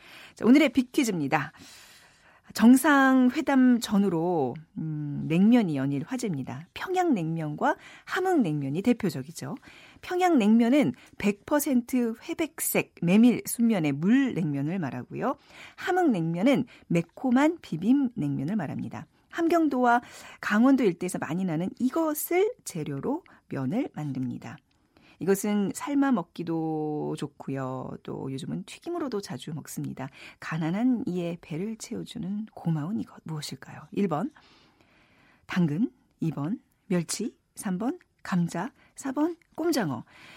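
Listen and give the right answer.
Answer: 3번: 감자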